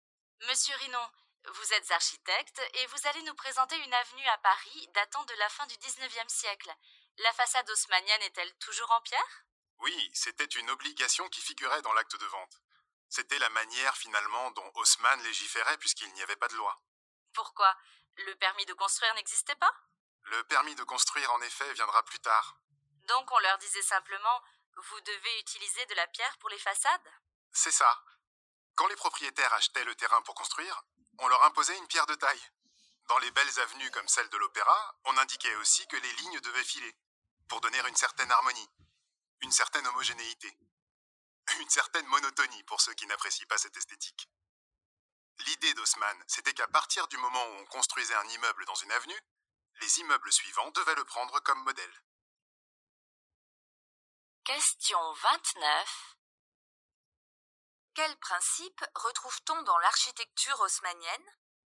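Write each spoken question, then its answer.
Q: Quels principes retrouve-t-on dans l'architecture haussmannienne ?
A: Des façades obligatoirement en pierre de taille, des lignes qui se suivent pour donner harmonie et homogénéité, et chaque nouvel immeuble qui prend le précédent comme modèle.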